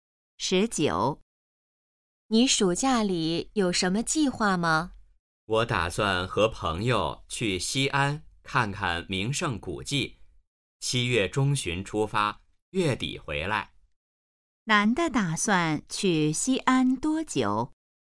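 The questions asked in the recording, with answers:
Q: 男的打算去西安多久?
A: 半个月左右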